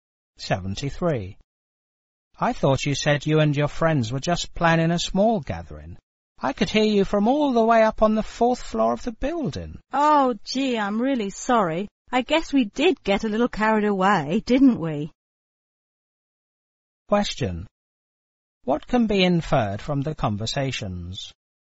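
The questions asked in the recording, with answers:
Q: What can be inferred from the conversations?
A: The party was noisier than planned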